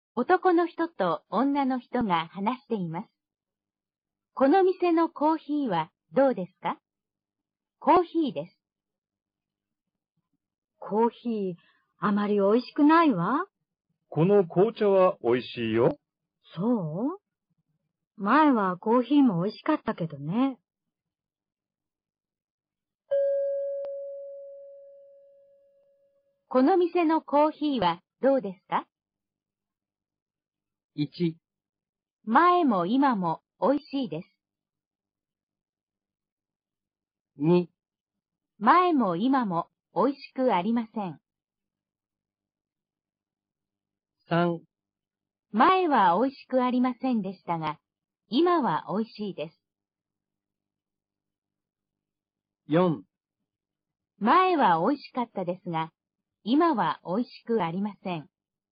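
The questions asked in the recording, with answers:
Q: この店のコーヒーはどうですか?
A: 4: 前は美味しかったですが、今は美味しくありません。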